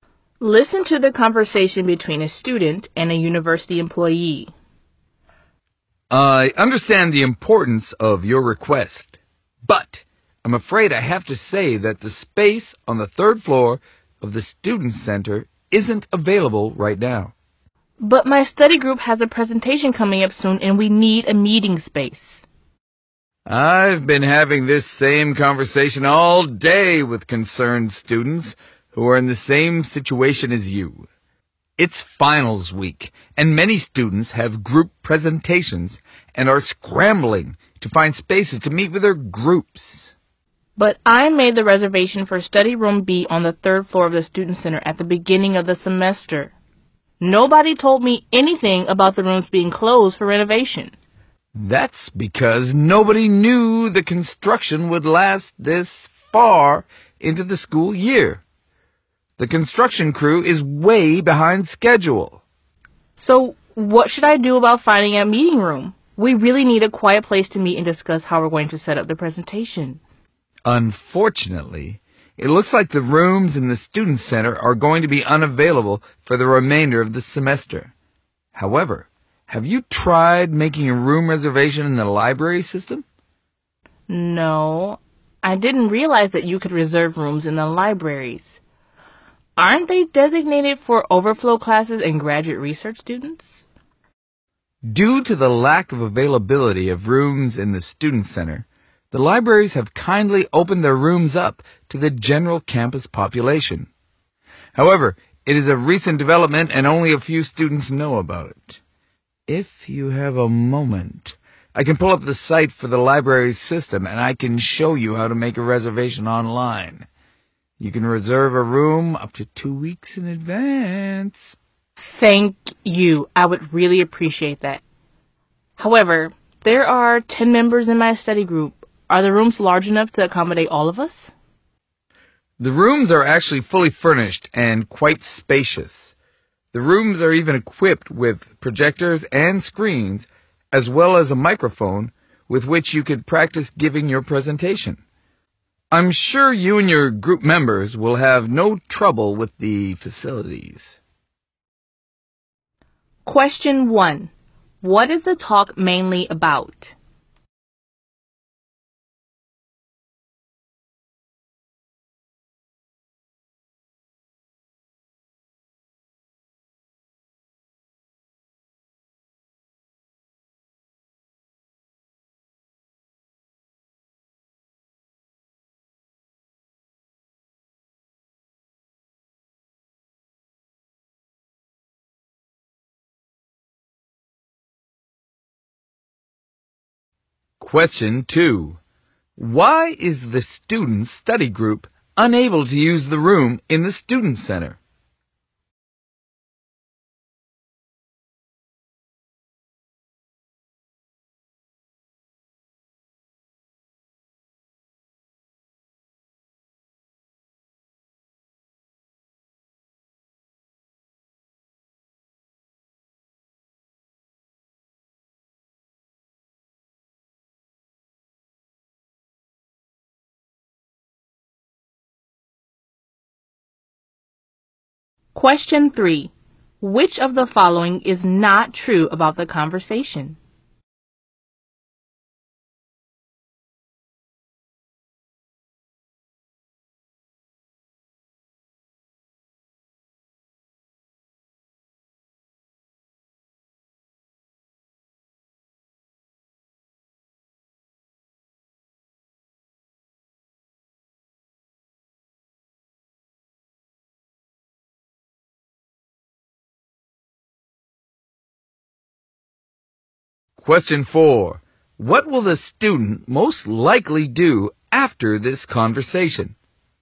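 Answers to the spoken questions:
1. Finding a meeting room for a study group because the student center rooms are closed
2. The rooms are closed for renovation, and the construction is behind schedule
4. Reserve a room online through the library system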